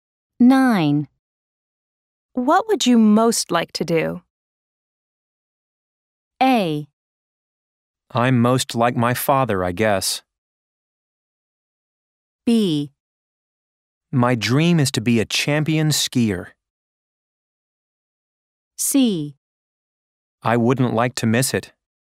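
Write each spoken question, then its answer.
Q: What would you most like to do?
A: B: My dream is to be a champion skier.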